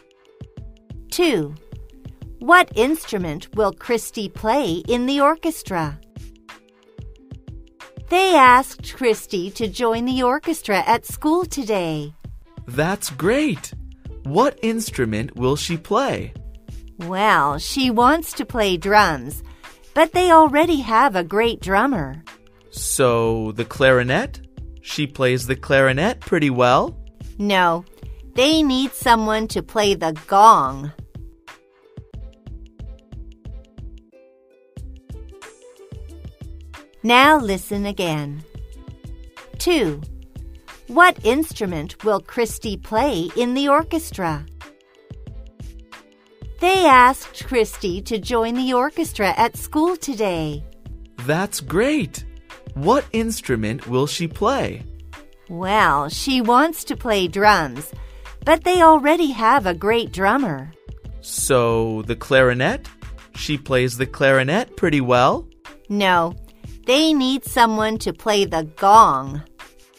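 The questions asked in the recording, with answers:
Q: What instrument will Christy play in the orchestra?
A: the gong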